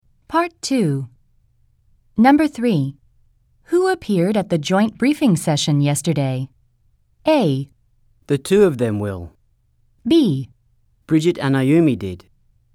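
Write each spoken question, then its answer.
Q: Who appeared at the joint briefing session yesterday?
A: B: Bridget and Ayumi did.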